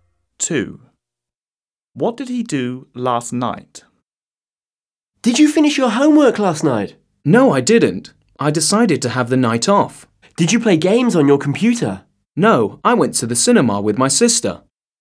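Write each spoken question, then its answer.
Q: What did he do last night?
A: went to the cinema with his sister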